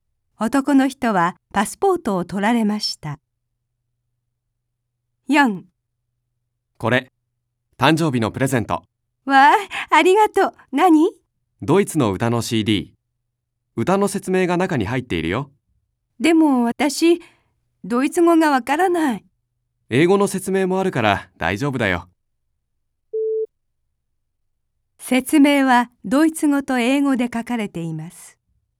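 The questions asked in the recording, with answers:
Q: 説明はドイツ語と英語で書かれています。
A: はい(正しい)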